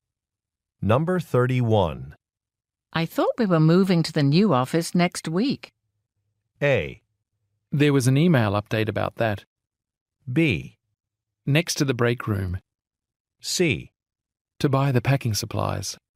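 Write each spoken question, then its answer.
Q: I thought we were moving to the new office next week.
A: A: There was an email update about that.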